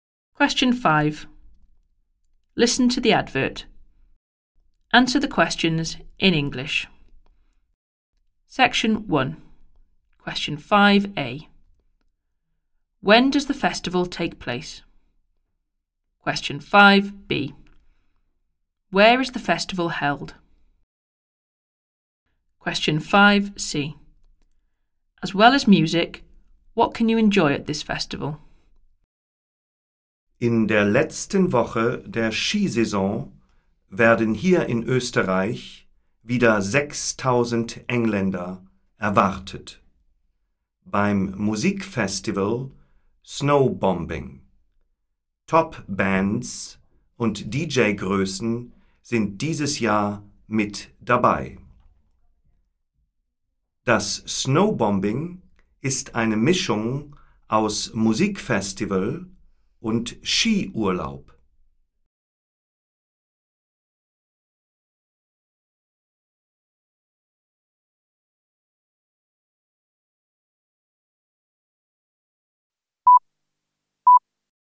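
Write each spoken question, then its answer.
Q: When does the festival take place?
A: In the last week of the ski season

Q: Where is the festival held?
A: In Austria

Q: As well as music, what can you enjoy at this festival?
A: Skiing (a ski holiday)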